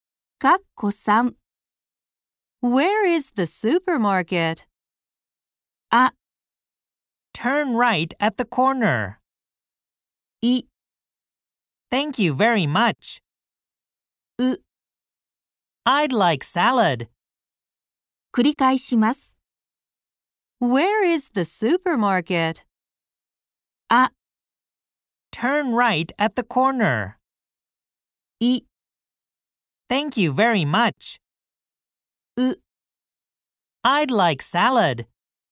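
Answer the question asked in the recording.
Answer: あ: Turn right at the corner.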